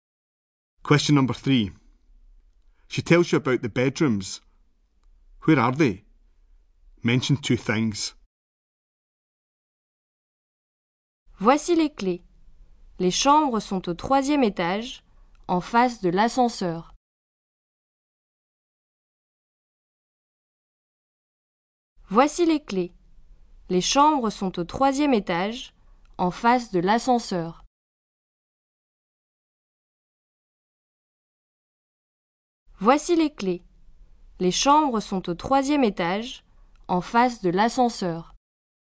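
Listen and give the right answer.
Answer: On the third floor, opposite the lift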